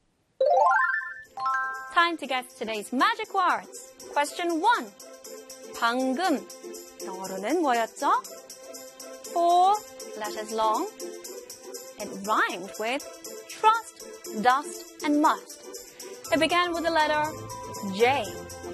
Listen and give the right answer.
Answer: 방금 영어로 just. Just.